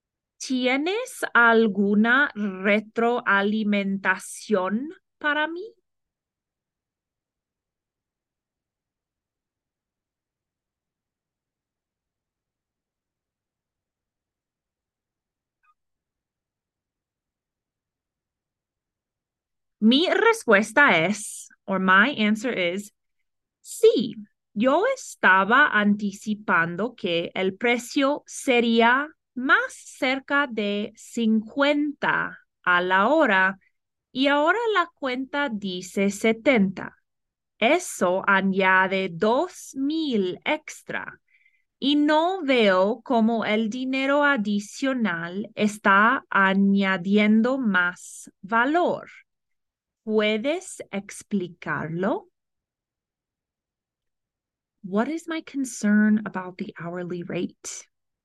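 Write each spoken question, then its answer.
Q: What is my concern about the hourly rate?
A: She expected about 50 an hour but the bill says 70, which adds 2,000 extra without clear added value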